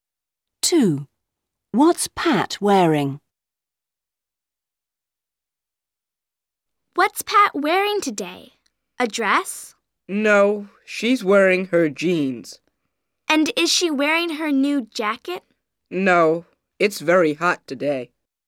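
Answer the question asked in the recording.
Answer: Her jeans (no jacket)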